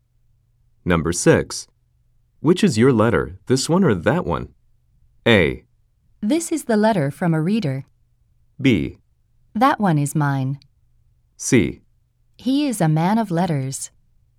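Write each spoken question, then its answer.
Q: Which is your letter, this one or that one?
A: B: That one is mine.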